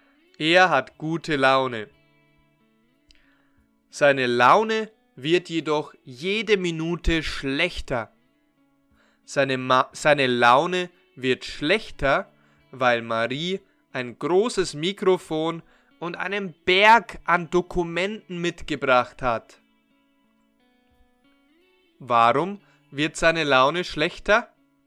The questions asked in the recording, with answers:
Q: Warum wird seine Laune schlechter?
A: Weil Marie ein großes Mikrofon und einen Berg an Dokumenten mitgebracht hat.